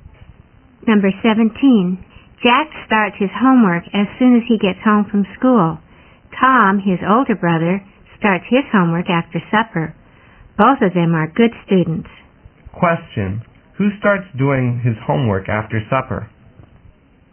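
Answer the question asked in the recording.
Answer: Tom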